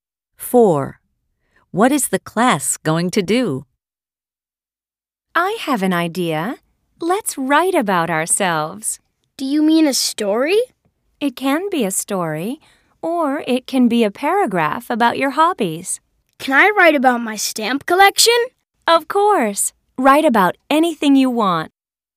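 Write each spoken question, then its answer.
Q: What is the class going to do?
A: write about themselves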